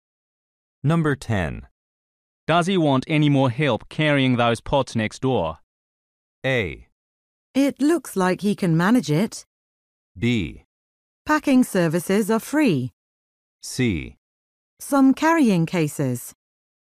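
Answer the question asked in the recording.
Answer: A: It looks like he can manage it.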